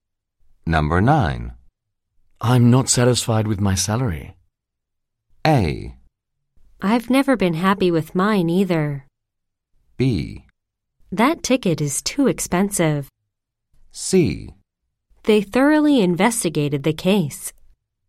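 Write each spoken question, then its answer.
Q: I'm not satisfied with my salary.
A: A: I've never been happy with mine either.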